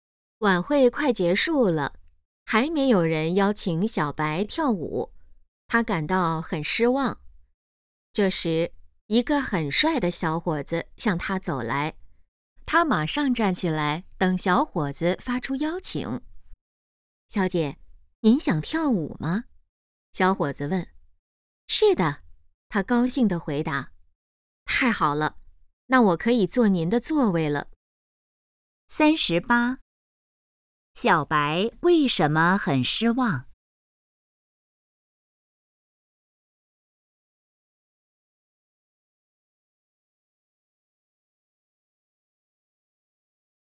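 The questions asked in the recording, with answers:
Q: 小白为什么很失望?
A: 没有人邀请她跳舞

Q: 小伙子想要做什么?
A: 坐她的座位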